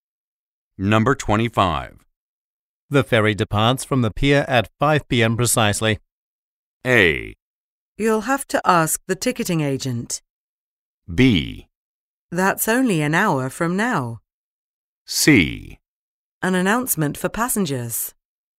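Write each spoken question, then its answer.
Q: The ferry departs from the pier at 5 p.m. precisely.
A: B: That's only an hour from now.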